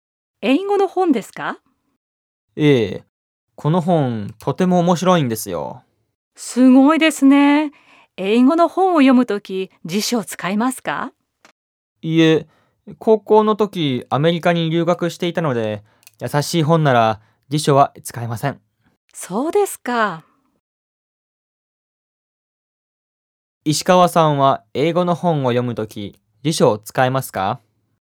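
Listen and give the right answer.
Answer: いいえ、辞書を使わないで読みます。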